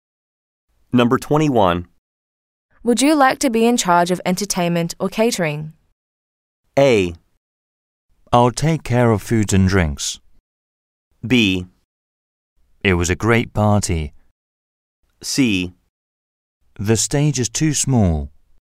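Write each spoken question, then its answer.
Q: Would you like to be in charge of entertainment or catering?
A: A: I'll take care of food and drinks.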